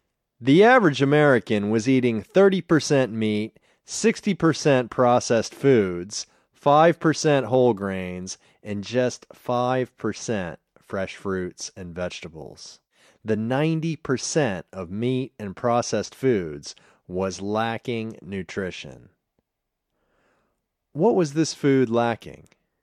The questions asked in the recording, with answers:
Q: What was this food lacking?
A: This food was lacking nutrition.